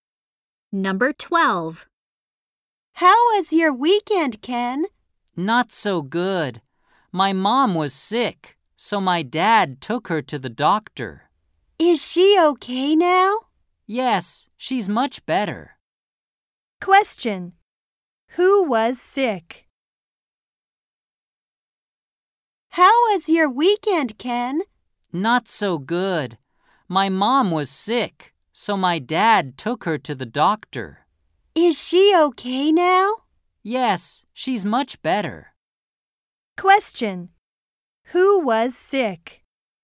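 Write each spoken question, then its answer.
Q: Who was sick?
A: Ken's mom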